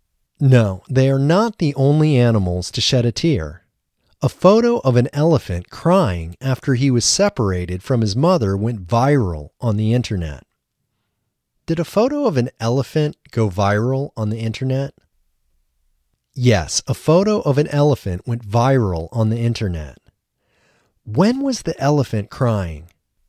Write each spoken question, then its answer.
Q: When was the elephant crying?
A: The elephant was crying after he was separated from his mother.